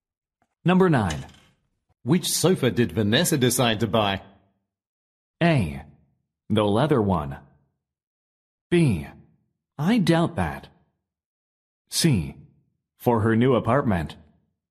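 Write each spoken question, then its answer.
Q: Which sofa did Vanessa decide to buy?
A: A: The leather one.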